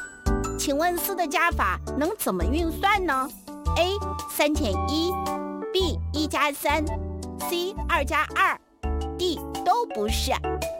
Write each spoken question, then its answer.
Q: 请问四的加法能怎么运算呢?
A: 答案就是 B 和 C。一加三和二加二都等于四。